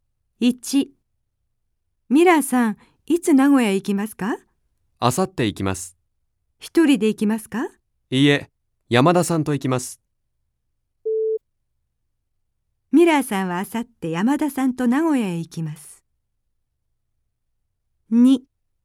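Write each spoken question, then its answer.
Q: ミラーさんはあさって山田さんと名古屋へ行きます。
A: ○(正しい)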